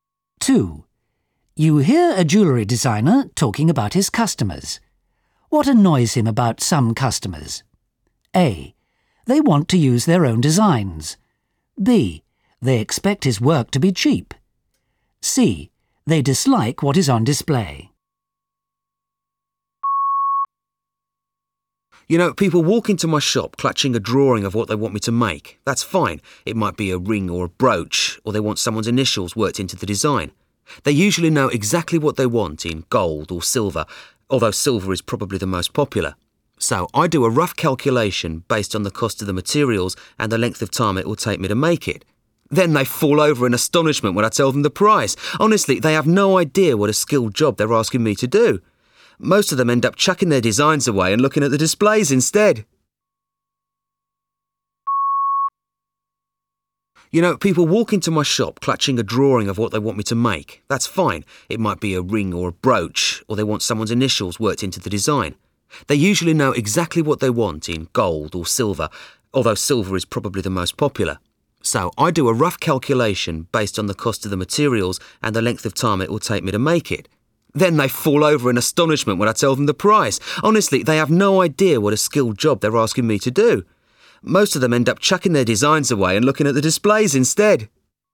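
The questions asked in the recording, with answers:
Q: What annoys him about some customers?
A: B: They expect his work to be cheap.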